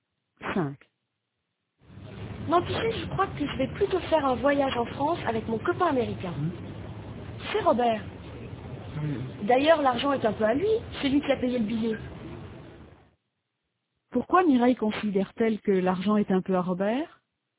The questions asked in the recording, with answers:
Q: Pourquoi Mireille considère-t-elle que l'argent est un peu à Robert?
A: Parce que c'est lui qui a acheté le billet.